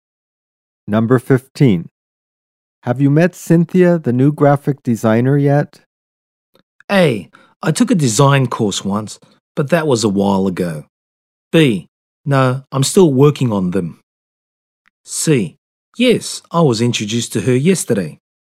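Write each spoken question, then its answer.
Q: Have you met Cynthia, the new graphic designer, yet?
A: C: Yes, I was introduced to her yesterday.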